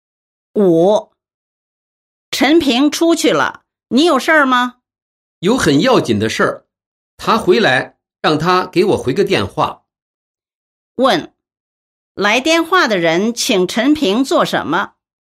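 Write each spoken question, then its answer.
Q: 来电话的人请陈平做什么?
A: 给他回个电话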